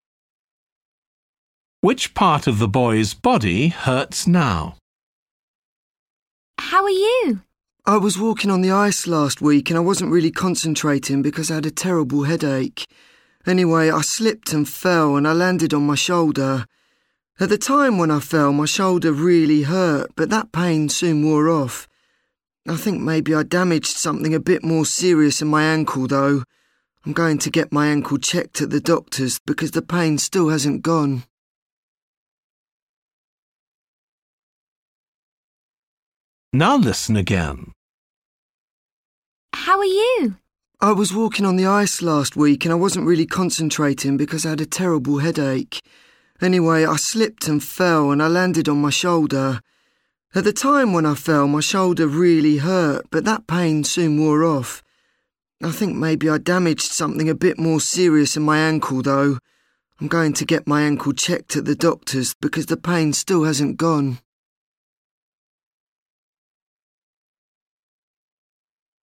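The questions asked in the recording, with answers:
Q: Which part of the boy's body hurts now?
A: his ankle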